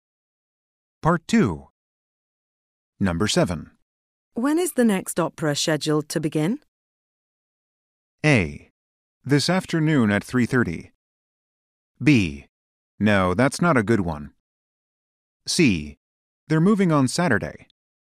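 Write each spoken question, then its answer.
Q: When is the next opera scheduled to begin?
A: A: This afternoon at 3:30.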